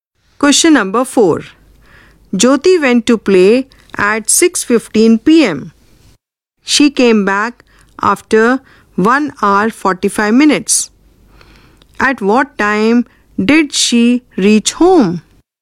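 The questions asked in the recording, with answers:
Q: At what time did she reach home?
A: 8:00 p.m.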